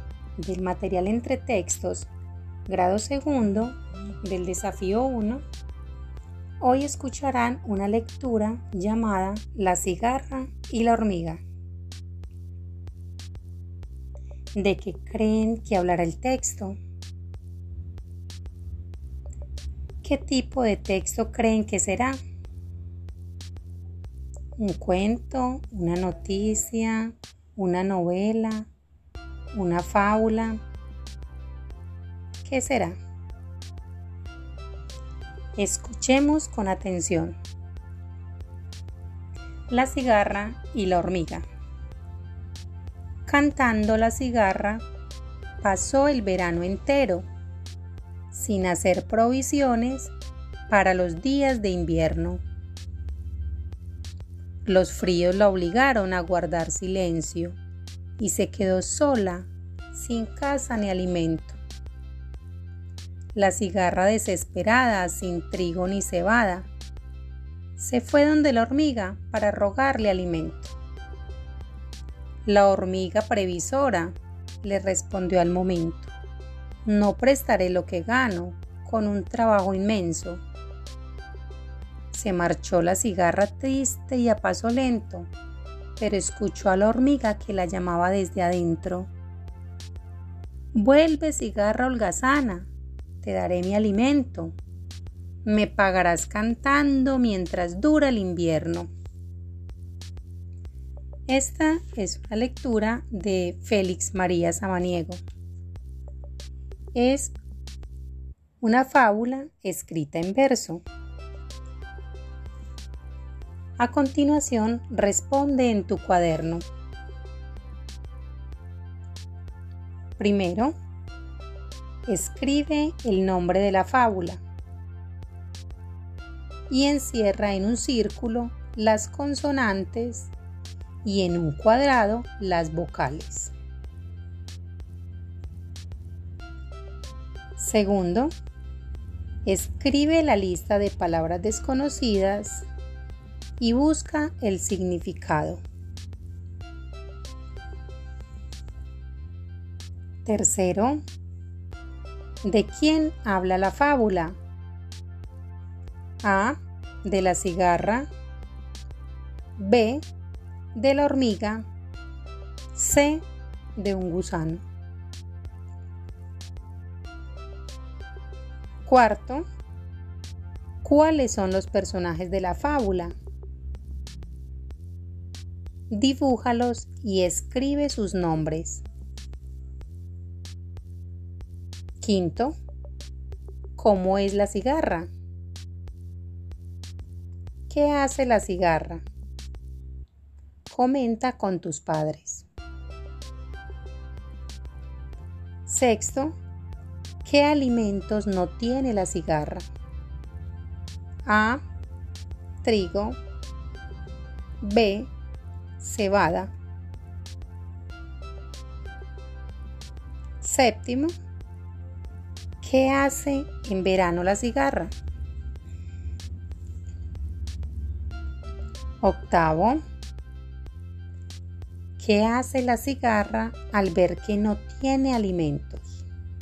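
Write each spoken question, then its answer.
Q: ¿qué hace en verano la cigarra?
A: Canta

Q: ¿qué hace la cigarra al ver que no tiene alimentos?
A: Va donde la hormiga a rogarle alimento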